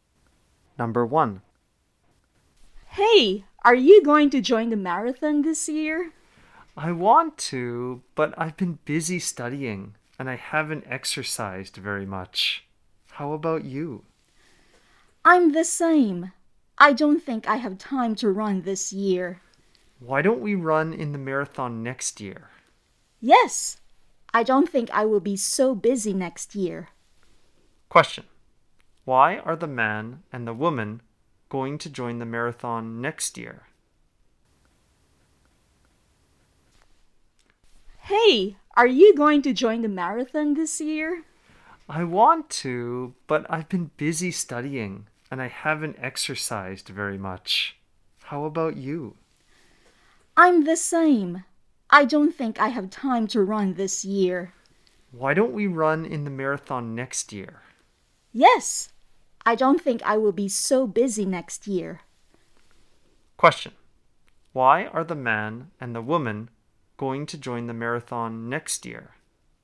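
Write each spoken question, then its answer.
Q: Question. Why are the man and the woman going to join the marathon next year?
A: Because they have been busy this year and don't think they will be so busy next year.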